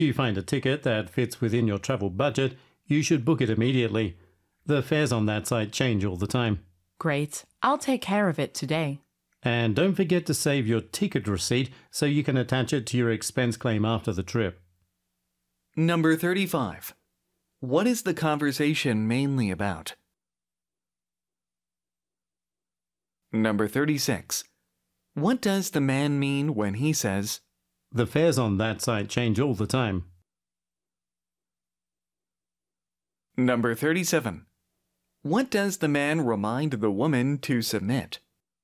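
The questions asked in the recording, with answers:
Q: What does the man remind the woman to submit?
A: Her ticket receipt with her expense claim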